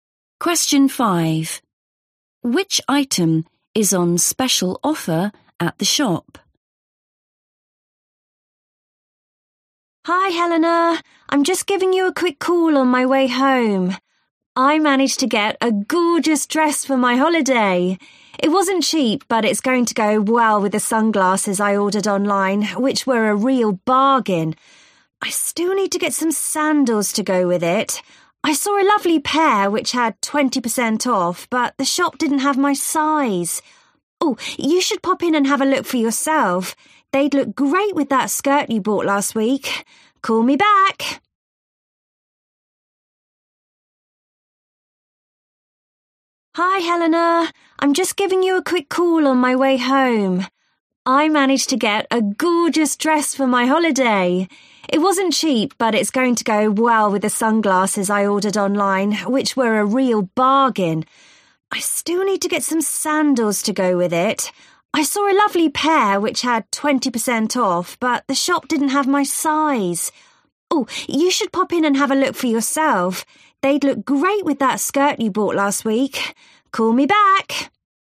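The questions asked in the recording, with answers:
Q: Which item is on special offer at the shop?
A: Sandals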